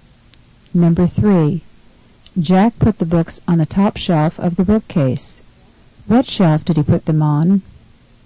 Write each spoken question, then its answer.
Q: What shelf did he put them on?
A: Number 3 is B, the upper shelf.